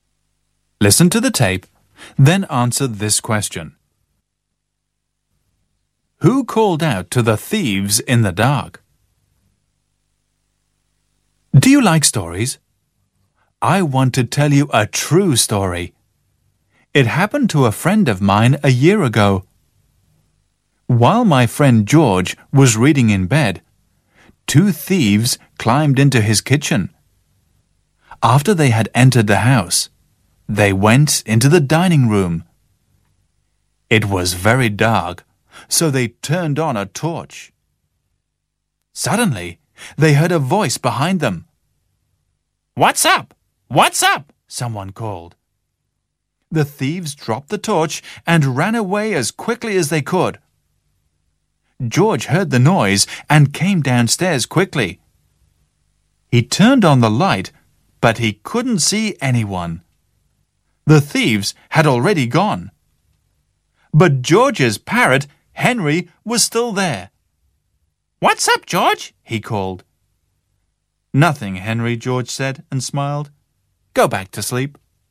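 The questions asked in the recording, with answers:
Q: Who called out to the thieves in the dark?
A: George's parrot, Henry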